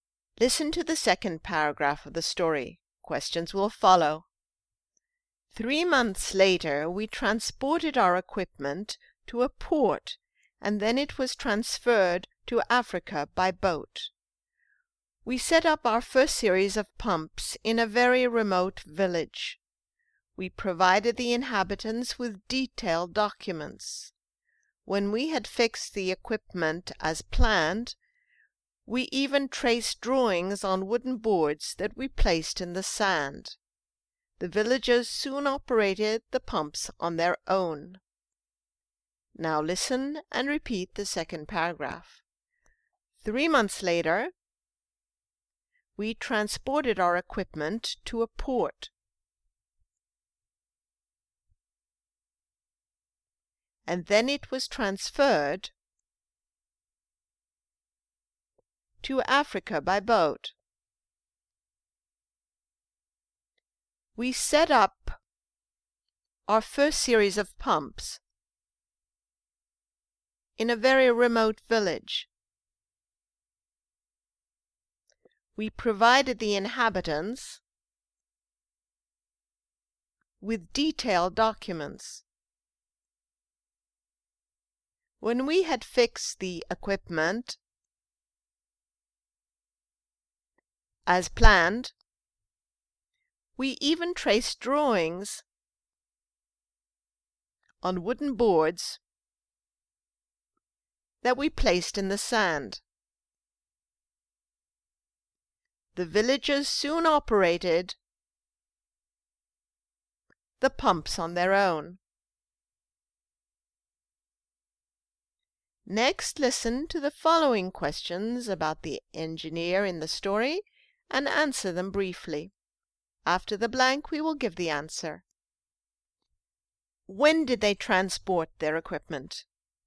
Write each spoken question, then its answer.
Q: When did they transport their equipment?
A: They transported it three months later.